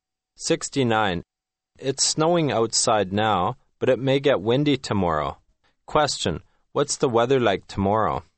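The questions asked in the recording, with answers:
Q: Question, what's the weather like tomorrow?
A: It may be windy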